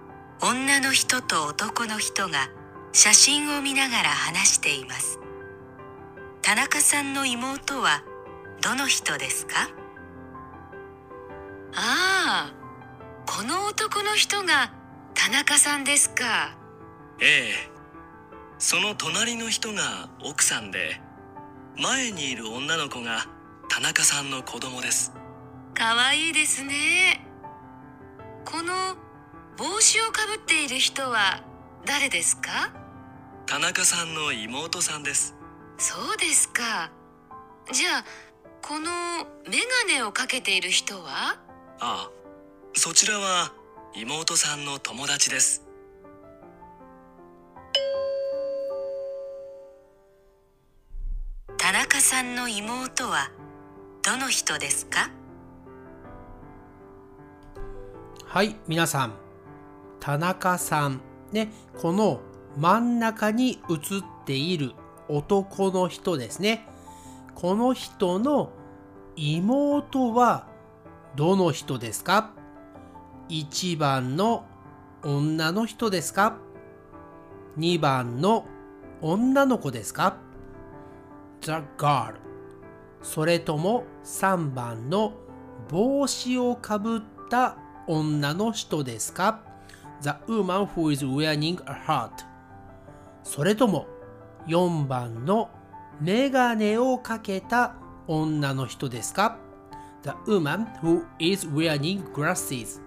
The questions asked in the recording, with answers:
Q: 田中さんの妹はどの人ですか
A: 今回の答えは3番です3番の帽子をかぶっている女の人が田中さんの妹です。